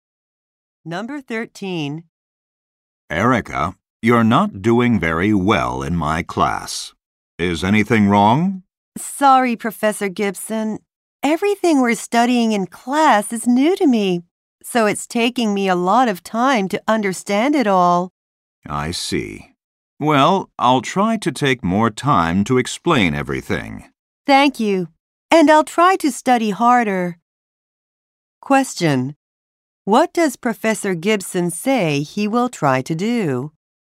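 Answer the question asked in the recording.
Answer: Take more time to explain everything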